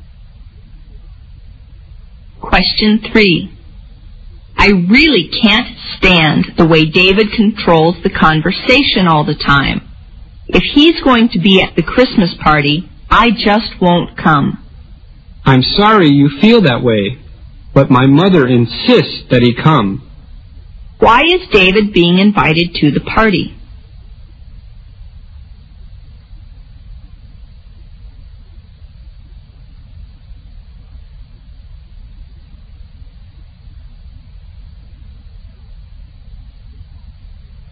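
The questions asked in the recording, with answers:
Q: Why is David being invited to the party?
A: The woman's mother insists that he come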